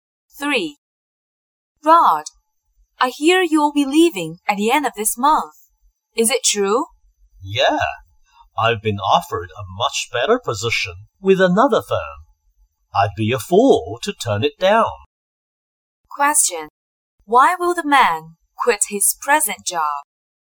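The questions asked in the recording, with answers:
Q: Why will the man quit his present job?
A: He has been offered a better position at another firm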